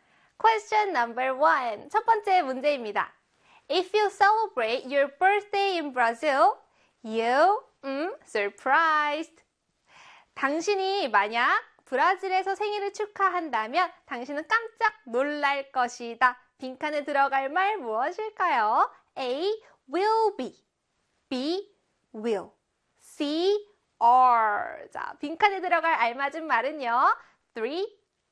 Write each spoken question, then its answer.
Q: If you celebrate your birthday in Brazil, you surprised.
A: 그렇죠. A의 will be입니다.